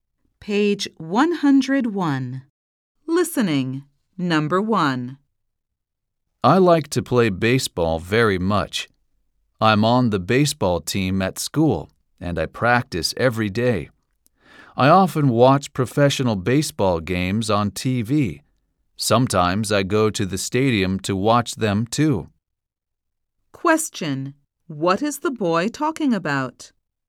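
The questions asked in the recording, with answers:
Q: What is the boy talking about?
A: Baseball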